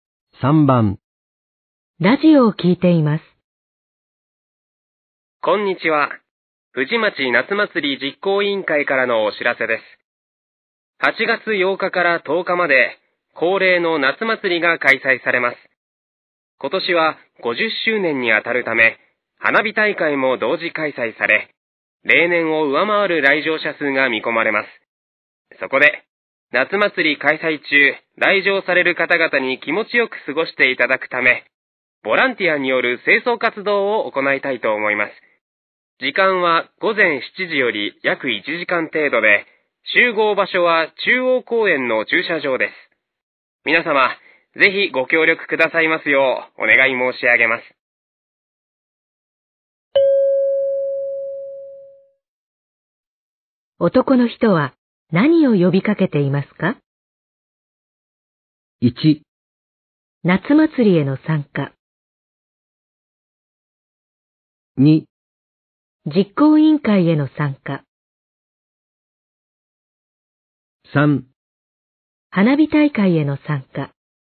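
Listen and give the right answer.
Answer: 4: 清掃ボランティアへの参加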